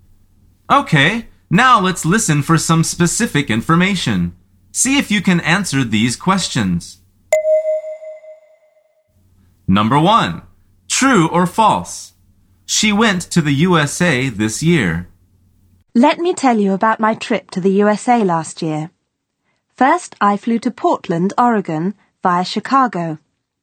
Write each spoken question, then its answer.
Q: True or false? She went to the USA this year.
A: The answer is false.